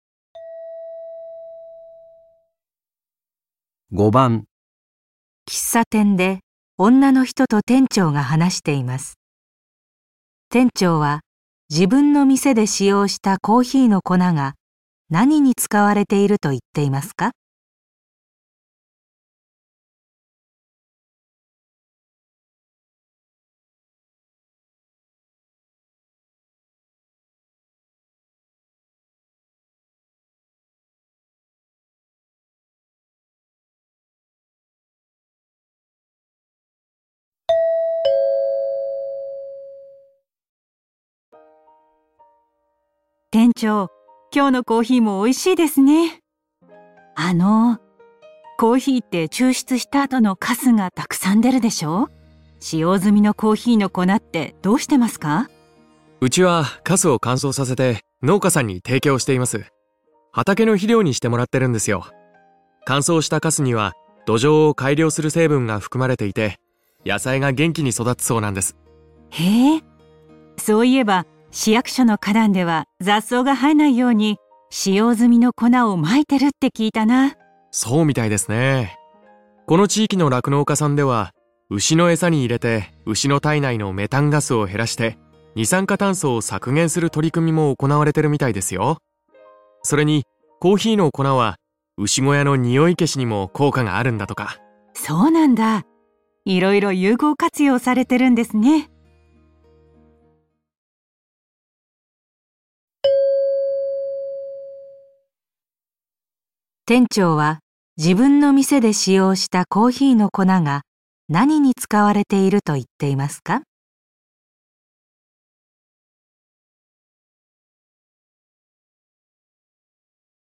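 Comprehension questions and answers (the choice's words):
5番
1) 畑のひりょうにすること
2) かだんに生える雑草を防ぐこと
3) 牛のえさを作ること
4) 牛の小屋のにおいを消すこと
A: 畑のひりょうにすること

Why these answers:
うちはカスを乾燥させて、農家さんに提供しています。 畑の肥料にしてもらってるんですよ。

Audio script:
女:店長、今日のコーヒーもおいしいですね。 あの、コーヒーって抽出した後のカスがたくさん出るでしょう?使 用済みのコーヒーの粉ってどうしてますか?
男:うちはカスを乾燥させて、農家さんに提供しています。 畑の肥料にしてもらってるんですよ。 乾燥したカスに は土壌を改良する成分が含まれていて野菜が元気に育つそうなんです。
女:へぇー、そういえば市役所の花壇では雑草が生えないように使用済みの粉を撒いてるって聞いたな。
男:そうみたいですね。 この地域の酪農家さんでは、牛のエサに入れて牛の体内のメタンガスを減らして、二酸 化炭素を削減する取り組みも行われてるみたいですよ。それにコーヒーの粉は牛小屋の臭い消しにも効果が あるんだとか。
女:そうなんだ。 いろいろ有効活用されてるんですね。
店長は自分の店で使用したコーヒーの粉が何に使われていると言っていますか。

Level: N1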